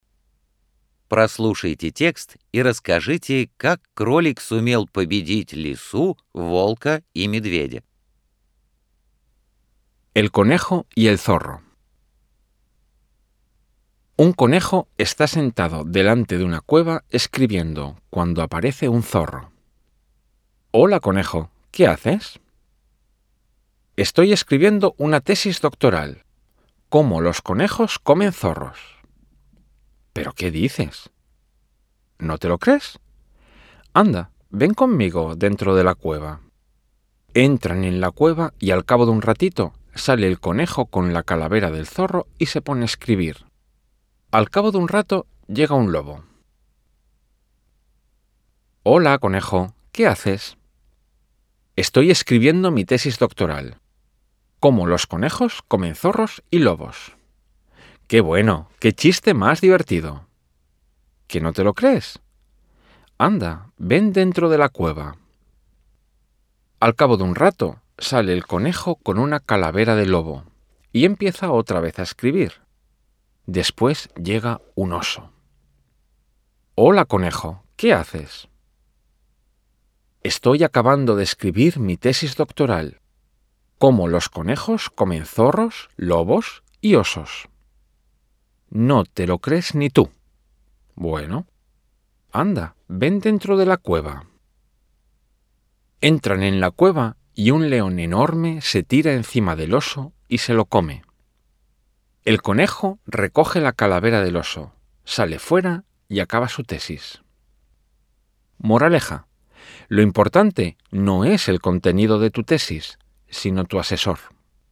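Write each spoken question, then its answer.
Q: Прослушайте текст и расскажите, как кролик сумел победить лису, волка и медведя.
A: Он заманивал их в пещеру, где их съедал огромный лев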